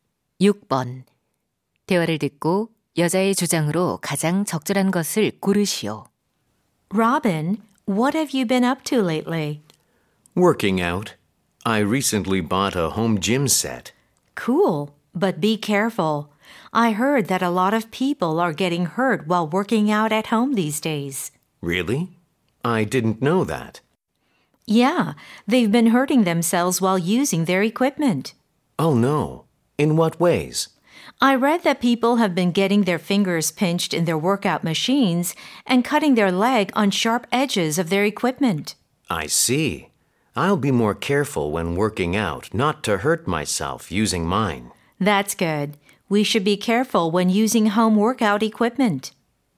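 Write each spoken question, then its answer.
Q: 대화를 듣고 여자의 주장으로 가장 적절한 것을 고르시오.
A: 홈트레이닝 기구 사용 시 부상에 주의해야 한다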